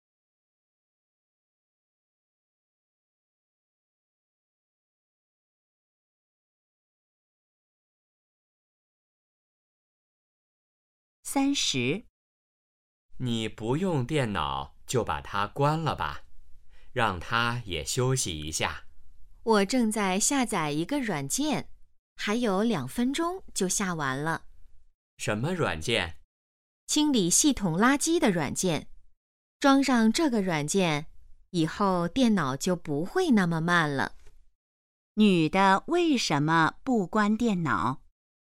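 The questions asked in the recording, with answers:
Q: 女的为什么不关电脑?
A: 正在下载软件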